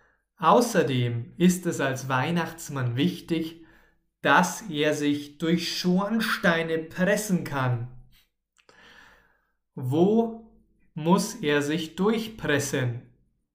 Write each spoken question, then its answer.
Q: Wo muss er sich durchpressen?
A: Durch Schornsteine. Er muss sich durch Schornsteine pressen.